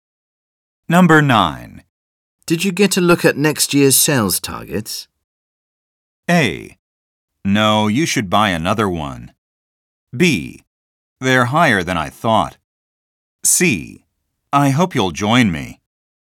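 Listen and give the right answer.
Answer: B: They're higher than I thought.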